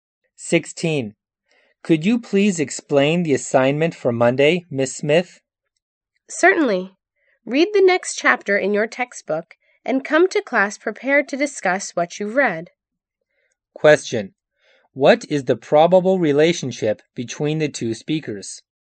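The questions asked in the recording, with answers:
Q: What is the probable relationship between the two speakers?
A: Teacher and student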